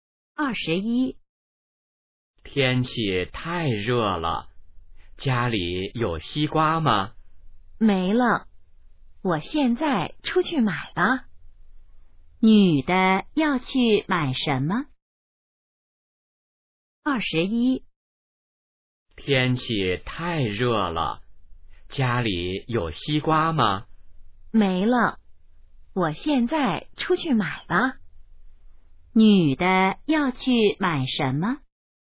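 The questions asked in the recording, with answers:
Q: 女的要去买什么?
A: 西瓜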